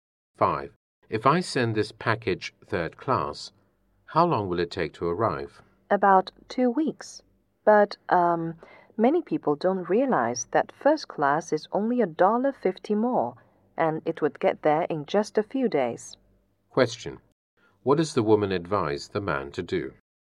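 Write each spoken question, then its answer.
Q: What does the woman advise the man to do?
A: Send the package first class.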